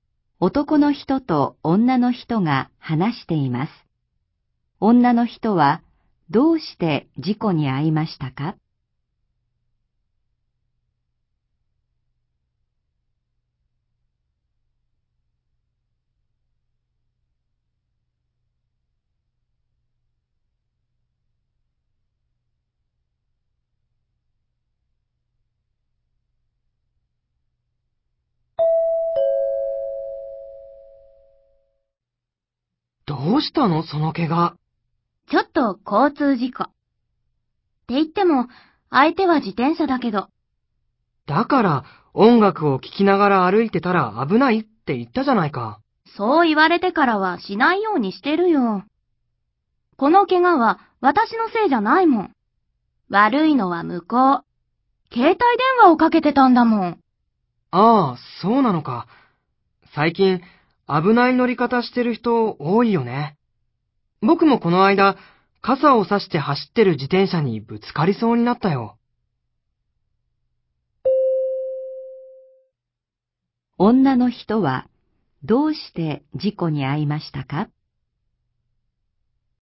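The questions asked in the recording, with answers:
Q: 女の人はどうして事故に遭いましたか?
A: 自転車に乗っている人が携帯電話をかけていたから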